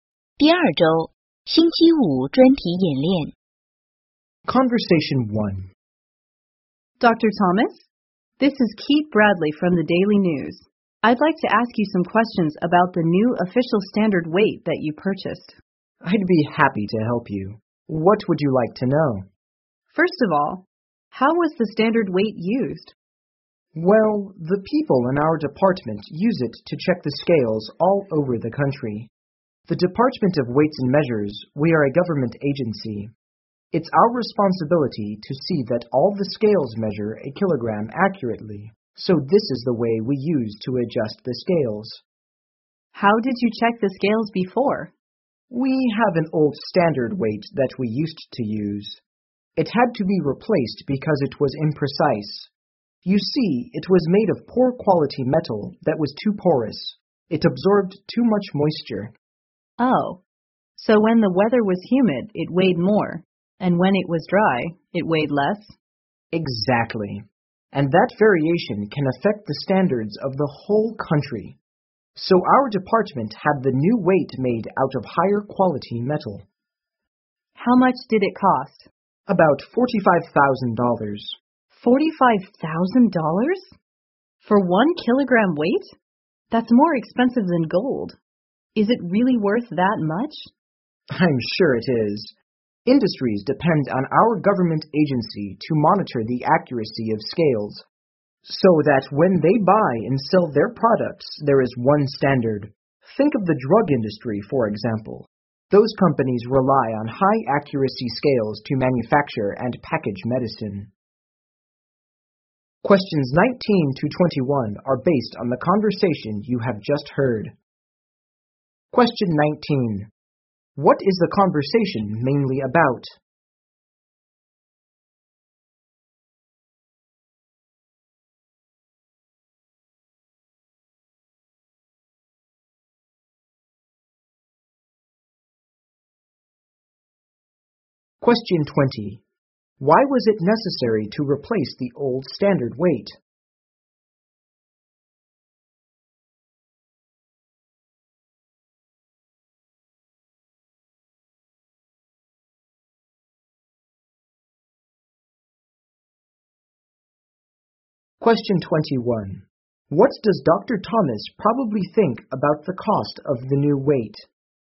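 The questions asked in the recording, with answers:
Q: What is the conversation mainly about?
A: The new official standard weight the department bought

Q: Why was it necessary to replace the old standard weight?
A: It was imprecise because its porous metal absorbed moisture

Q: What does Dr. Thomas probably think about the cost of the new weight?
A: It is worth the money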